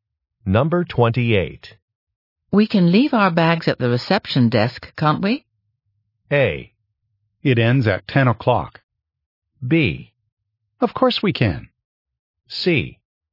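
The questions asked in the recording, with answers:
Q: We can leave our bags at the reception desk, can't we?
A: B: Of course we can.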